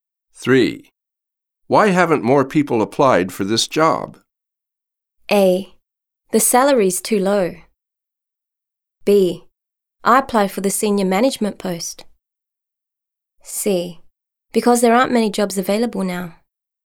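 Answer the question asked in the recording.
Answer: A: The salary's too low.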